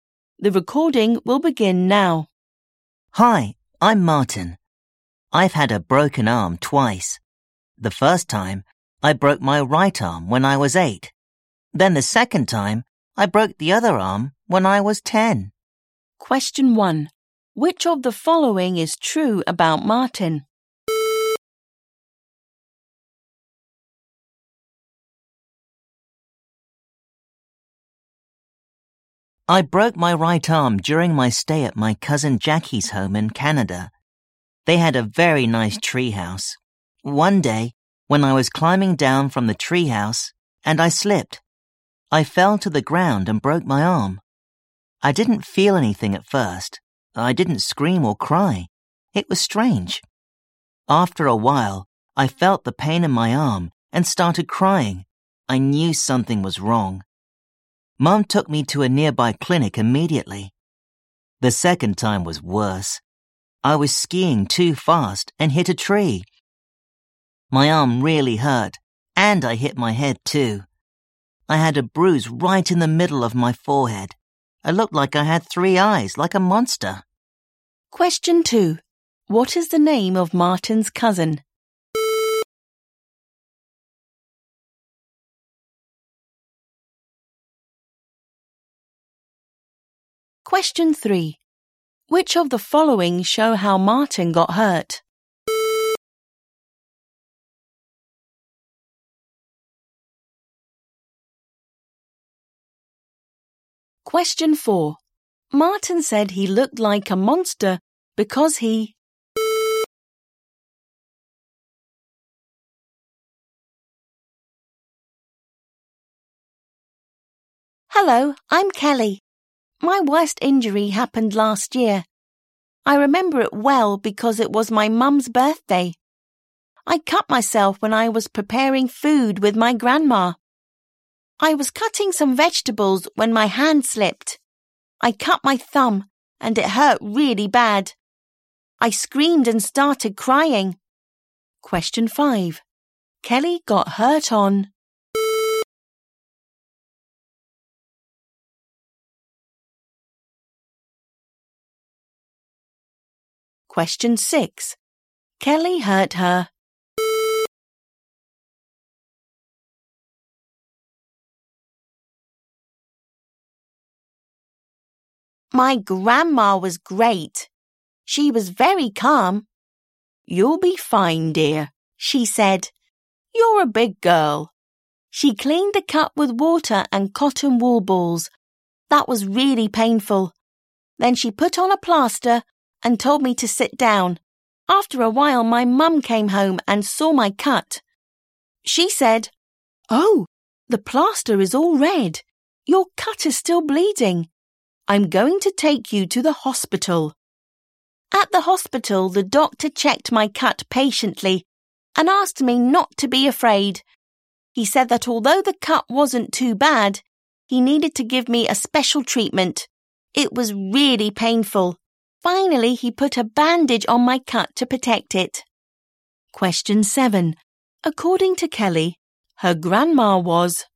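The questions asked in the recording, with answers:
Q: What is the name of Martin's cousin?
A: Jackie

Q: Martin said he looked like a monster because he...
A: had a bruise in the middle of his forehead

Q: Kelly got hurt on...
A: her mum's birthday

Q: Kelly hurt her...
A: thumb

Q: According to Kelly, her grandma was...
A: calm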